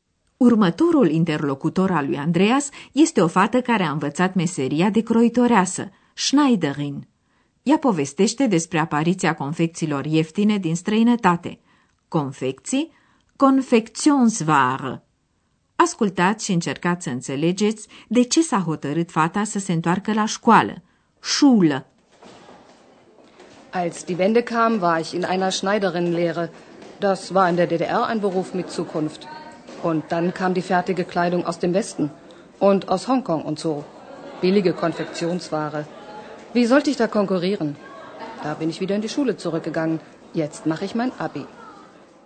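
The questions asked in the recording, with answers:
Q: Ascultați și încercați să înțelegeți de ce s-a hotărât fata să se întoarcă la școală.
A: Nu putea concura cu confecțiile ieftine din vest și din Hong Kong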